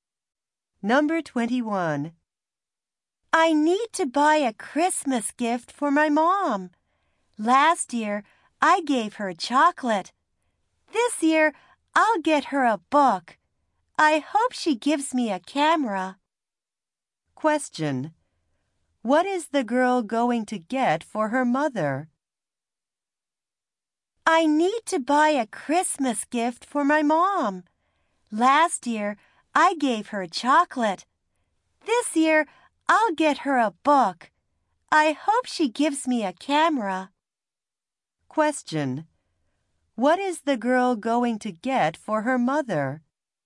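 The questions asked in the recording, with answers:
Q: What is the girl going to get for her mother?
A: A book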